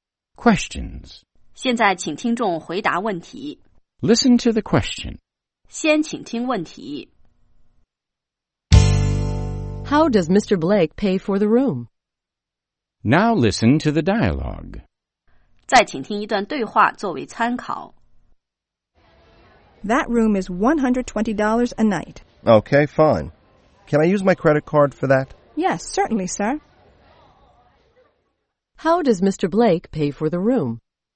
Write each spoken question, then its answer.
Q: How does Mr. Blake pay for the room?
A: He uses his credit card.